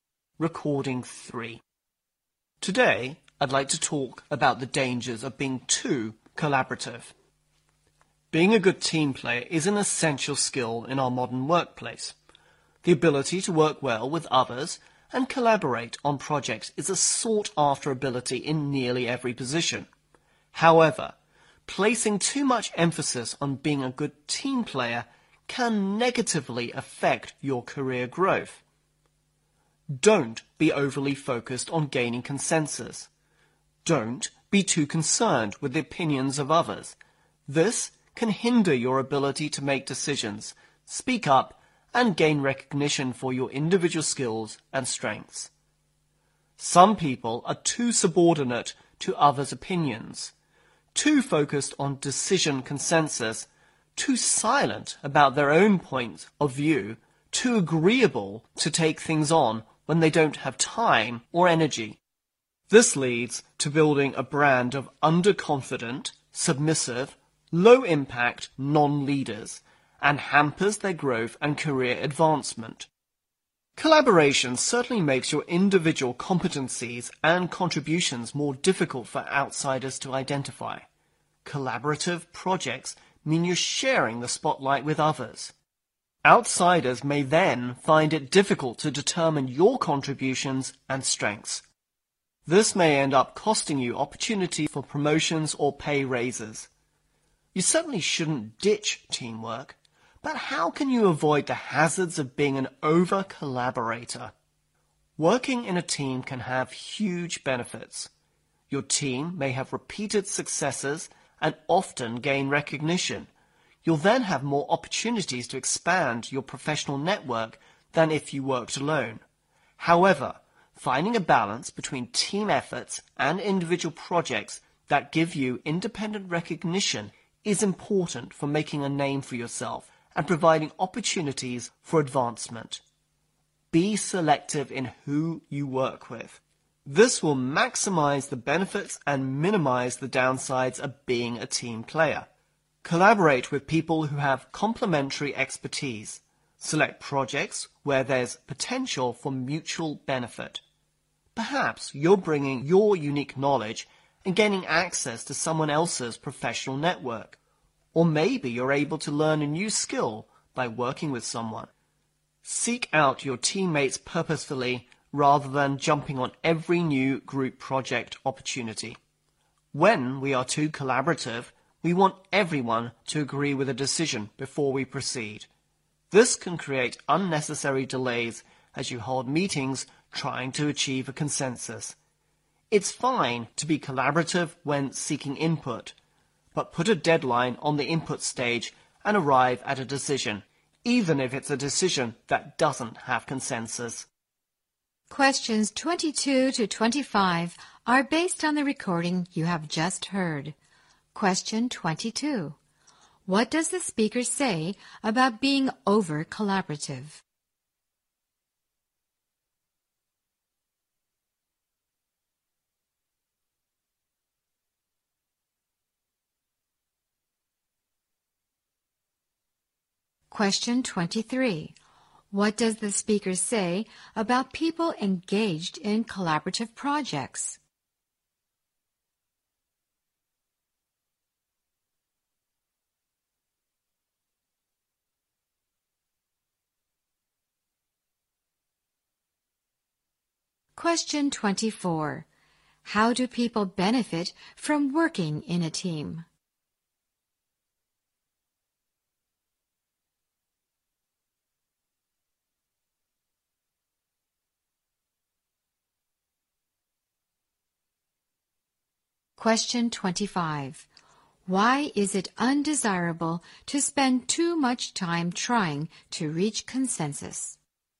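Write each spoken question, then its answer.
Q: What does the speaker say about being over-collaborative?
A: It can negatively affect your career growth

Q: What does the speaker say about people engaged in collaborative projects?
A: Their individual contributions are hard for outsiders to identify

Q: How do people benefit from working in a team?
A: More opportunities to expand their professional network

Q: Why is it undesirable to spend too much time trying to reach consensus?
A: It creates unnecessary delays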